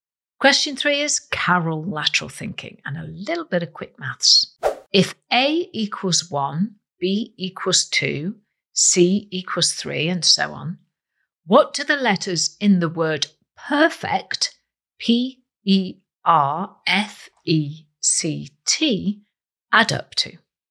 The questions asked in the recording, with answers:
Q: If A equals 1, B equals 2, C equals 3, and so on, what do the letters in the word perfect,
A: The answer is they add up to 73.